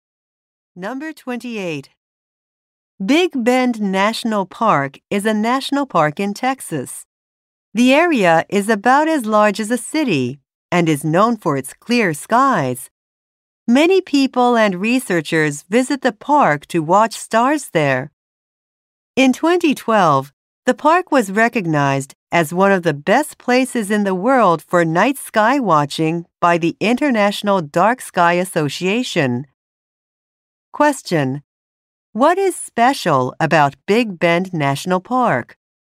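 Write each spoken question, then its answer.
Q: What is special about Big Bend National Park?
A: It is one of the best places in the world to watch the night sky.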